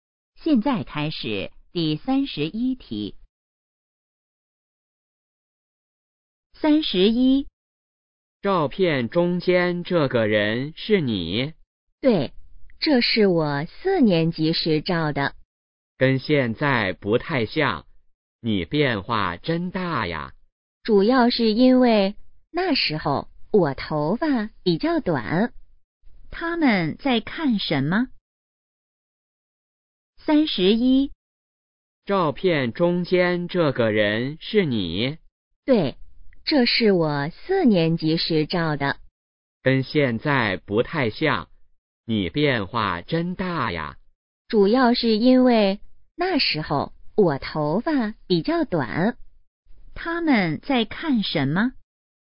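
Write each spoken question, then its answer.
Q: 他们在看什么?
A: 照片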